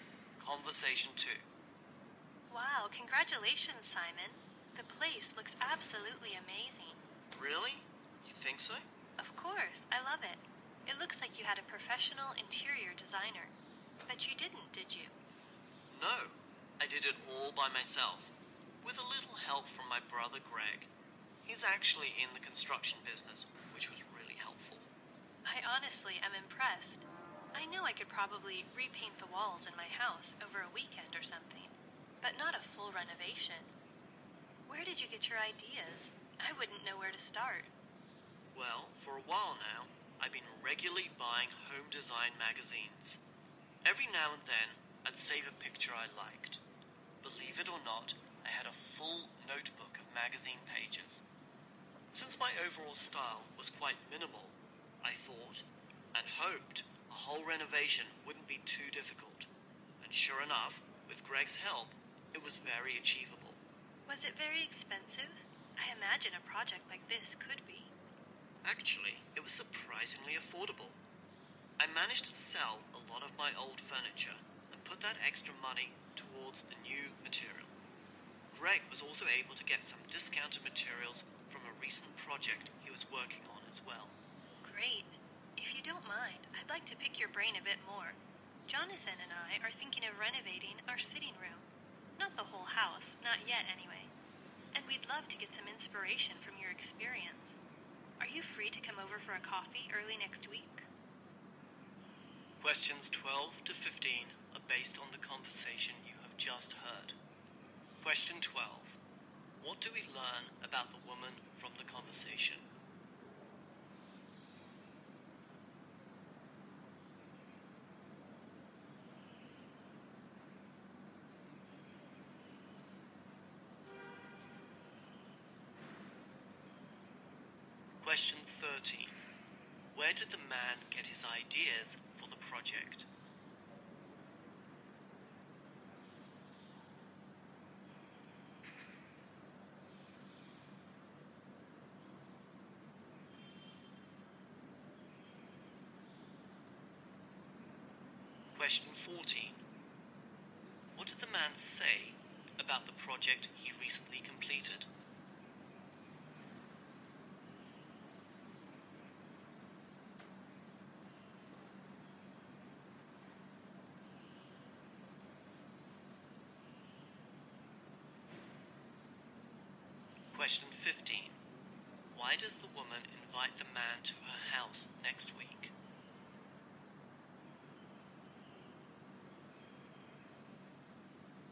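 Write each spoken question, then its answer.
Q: Where did the man get his ideas for the project?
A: From home design magazines.

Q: Why does the woman invite the man to her house next week?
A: To get inspiration from his experience for her own renovation.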